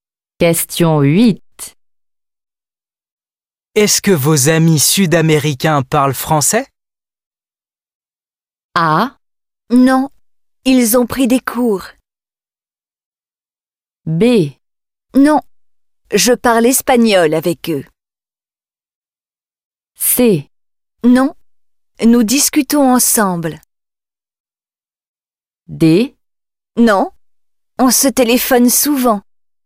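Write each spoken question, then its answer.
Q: Est-ce que vos amis sud-américains parlent français?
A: B: Non, je parle espagnol avec eux.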